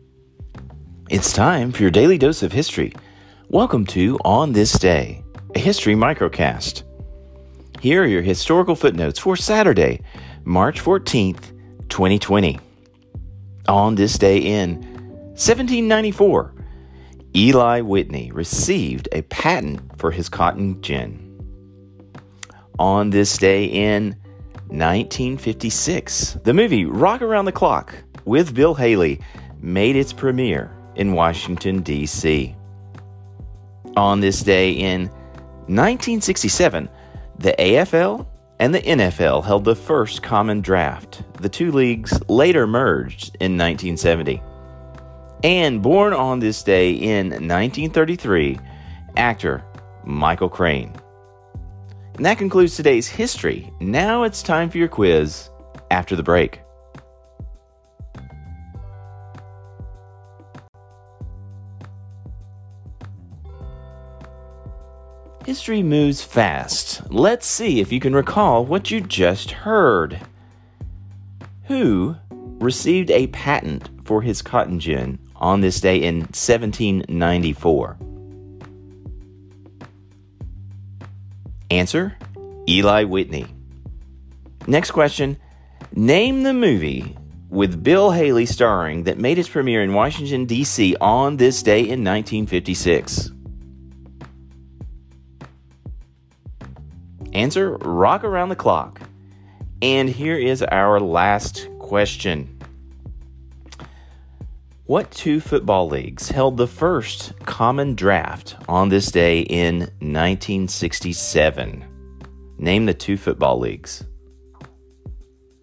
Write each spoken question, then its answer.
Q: Who received a patent for his cotton gin on this day in 1794?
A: Answer, Eli Whitney.

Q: Name the movie with Bill Haley starring that made its premiere in Washington, D.C. on this day in 1956.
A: Answer, Rock Around the Clock.

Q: What two football leagues held the first common draft on this day in 1967?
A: Answer, it was the AFL and the NFL, which did later merge into one league in 1970.